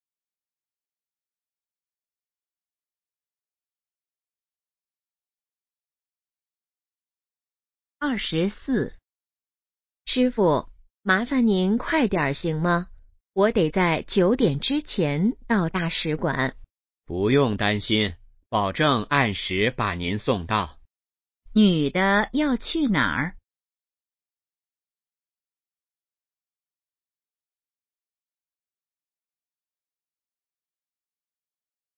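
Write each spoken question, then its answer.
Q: 女的要去哪儿?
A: 大使馆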